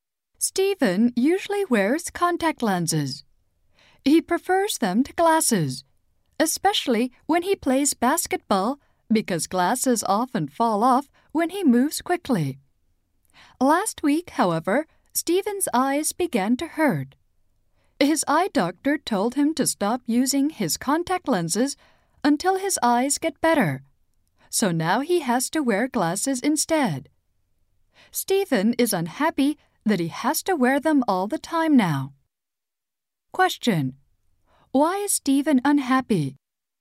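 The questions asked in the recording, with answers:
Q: Why is Stephen unhappy?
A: He has to wear glasses all the time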